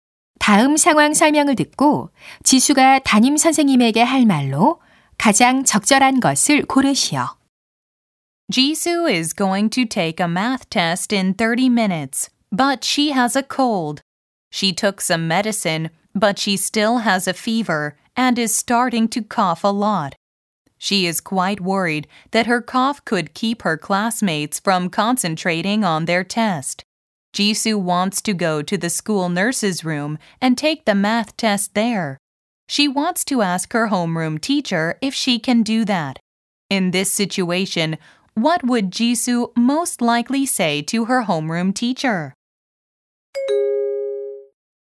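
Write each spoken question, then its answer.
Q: In this situation, what would Jisoo most likely say to her homeroom teacher?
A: Could I take the math test in the school nurse's room?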